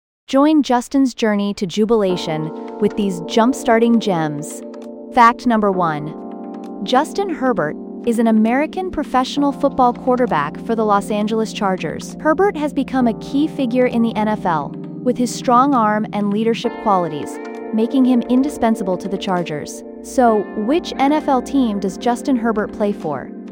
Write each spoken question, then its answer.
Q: So, which NFL team does Justin Herbert play for?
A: Correct answer, Los Angeles Chargers.